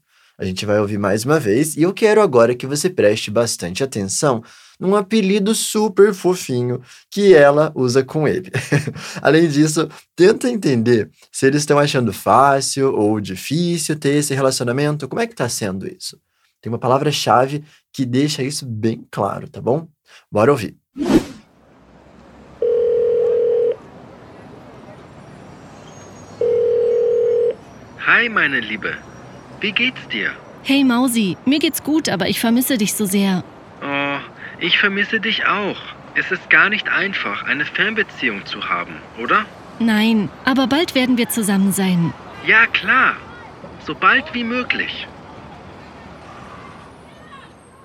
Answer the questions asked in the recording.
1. Mausi, que é uma forma mais bonitinha da palavra rato.
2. Não é nada fácil ter um relacionamento à distância, né?